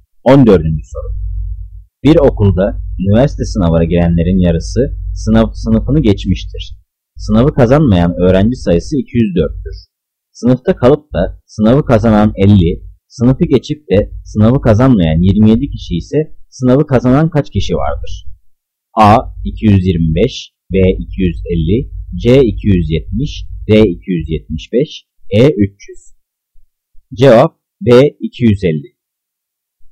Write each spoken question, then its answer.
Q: Sınıfta kalıp da sınavı kazanan 50, sınıfı geçip de sınavı kazanmayan 27 kişi ise sınavı kazanan kaç kişi vardır?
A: Cevap B 250.